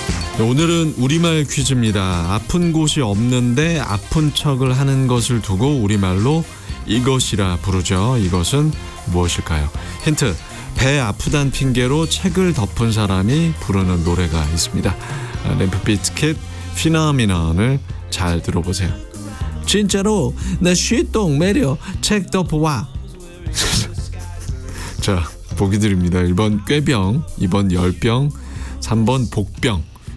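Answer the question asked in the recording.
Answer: 1번: 꾀병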